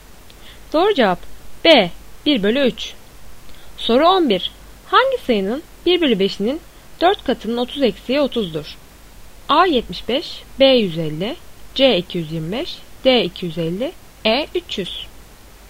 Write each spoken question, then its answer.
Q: Hangi sayının 1/5'inin 4 katının 30 eksiği 30'dur?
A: Doğru cevap A 75.